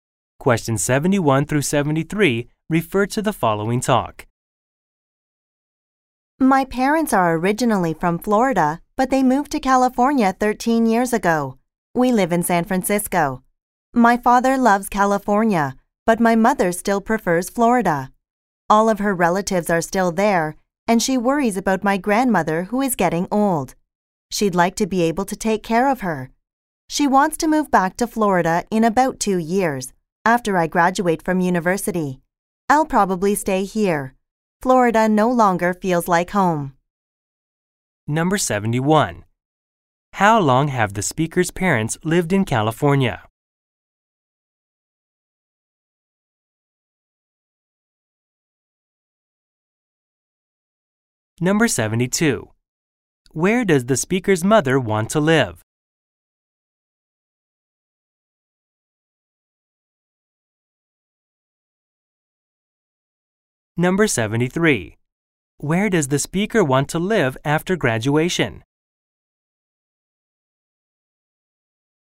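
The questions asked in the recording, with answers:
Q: How long have the speaker's parents lived in California?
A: 13 years

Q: Where does the speaker's mother want to live?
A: Florida

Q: Where does the speaker want to live after graduation?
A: San Francisco, California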